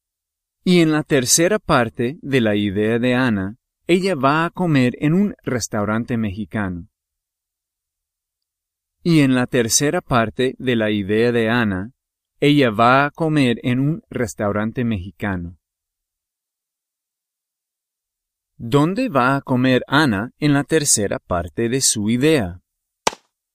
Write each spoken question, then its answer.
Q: ¿Dónde va a comer Ana en la tercera parte de su idea?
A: Un restaurante mexicano.